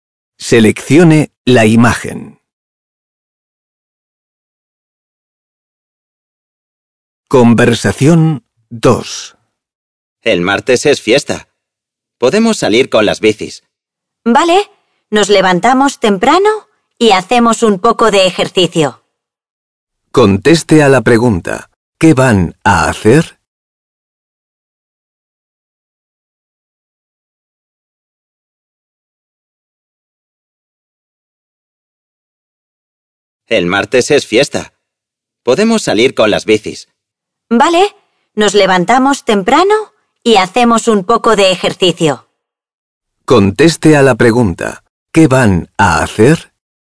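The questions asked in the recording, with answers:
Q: ¿qué van a hacer?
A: salir en bici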